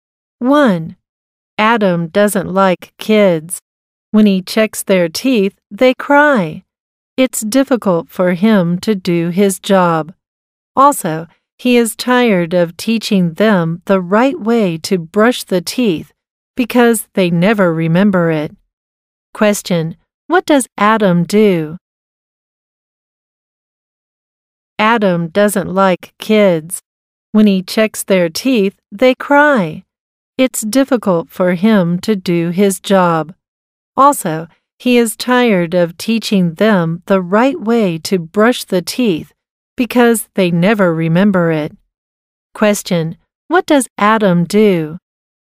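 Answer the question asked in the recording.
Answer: He is a dentist.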